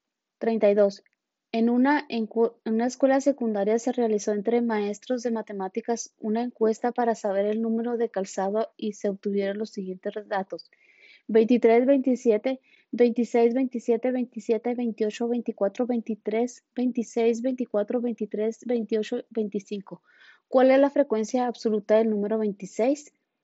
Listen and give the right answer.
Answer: Y la respuesta correcta es la A, 2.